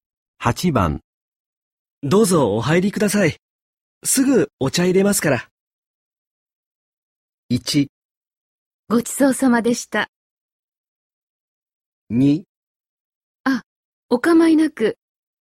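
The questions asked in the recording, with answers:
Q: どうぞお入りください。すぐお茶入れますから。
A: 2: あ、お構いなく。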